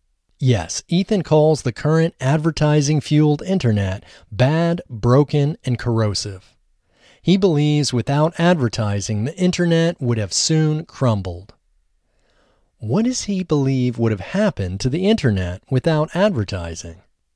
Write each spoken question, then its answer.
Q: What does he believe would have happened to the internet without advertising?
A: He believes the internet would have soon crumbled without advertising